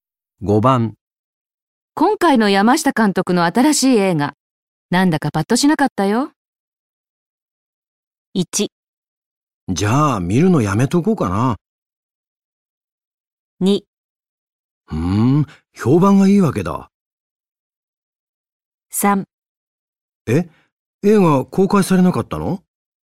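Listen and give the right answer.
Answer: 1: じゃあ見るのやめとこうかな。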